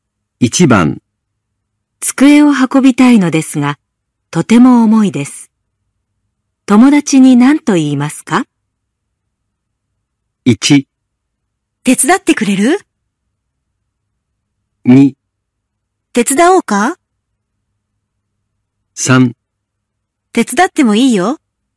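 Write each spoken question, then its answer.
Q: 机を運びたいのですが、とても重いです。友達に何と言いますか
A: 1: 手伝ってくれる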